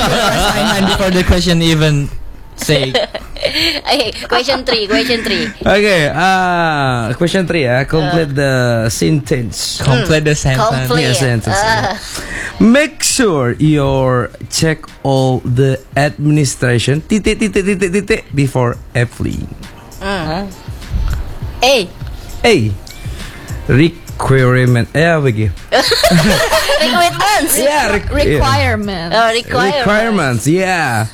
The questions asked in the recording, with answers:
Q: Complete the sentence.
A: It should be requirement.